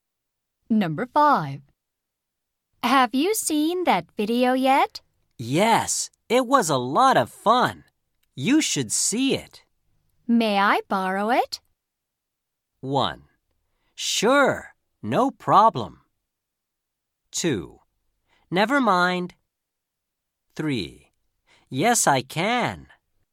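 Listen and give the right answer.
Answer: 1: Sure, no problem.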